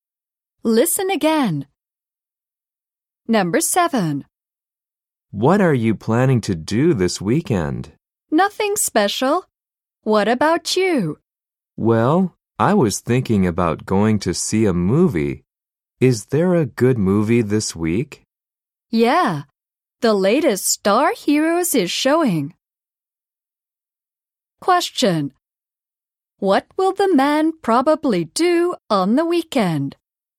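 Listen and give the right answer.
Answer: See a movie (the latest Star Heroes)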